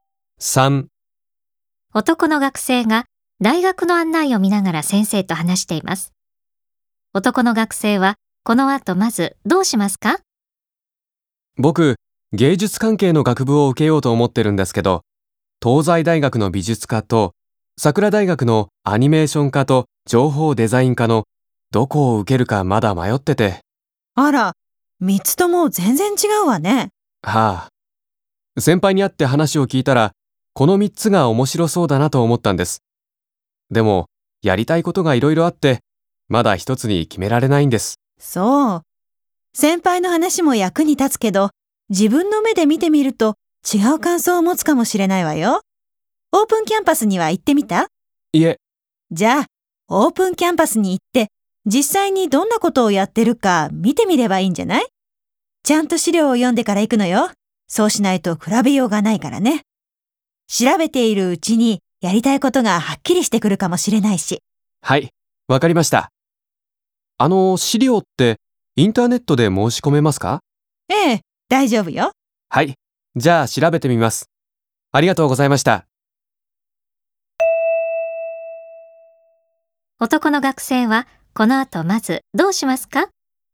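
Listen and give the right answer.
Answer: インターネットで大学の資料を申し込む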